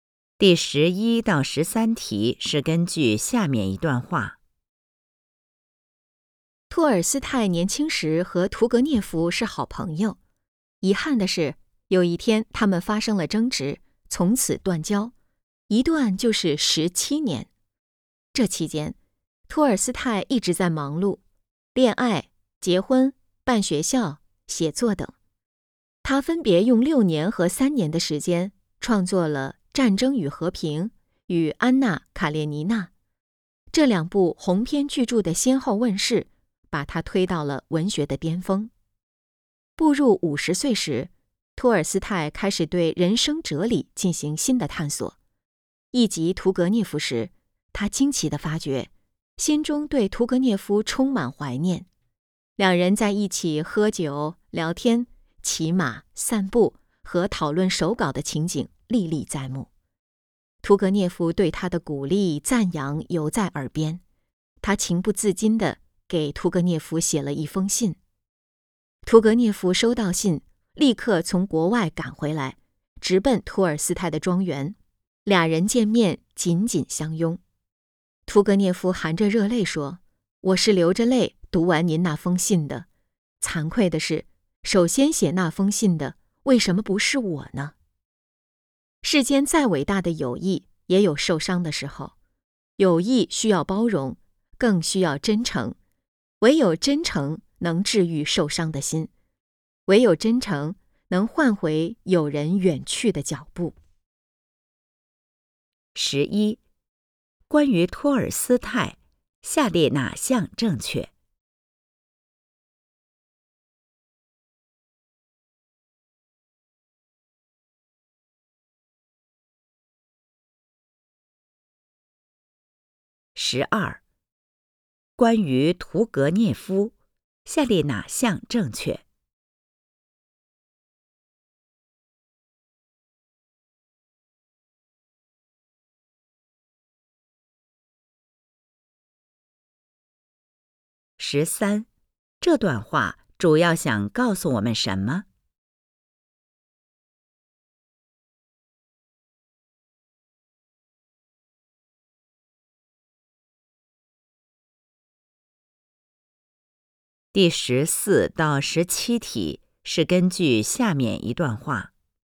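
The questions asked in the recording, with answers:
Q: 十三,这段话主要想告诉我们什 么?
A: 友谊需要包容,更需要真诚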